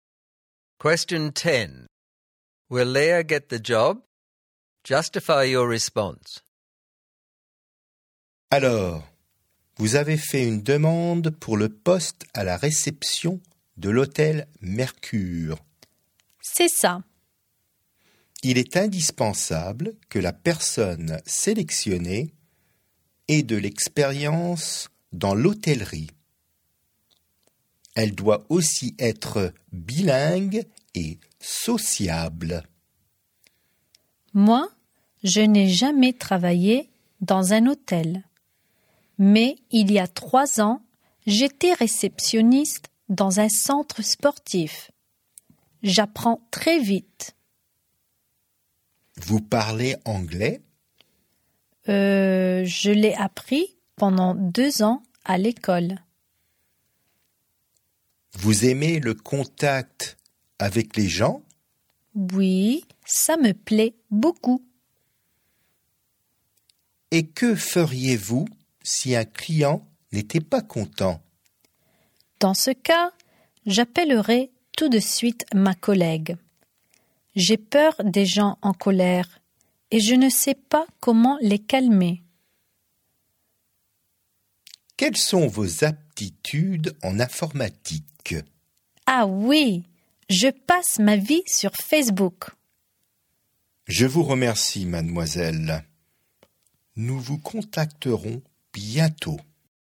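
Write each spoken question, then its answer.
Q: Will Leah get the job?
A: No: she has no hotel experience, is not really bilingual, and cannot deal with unhappy clients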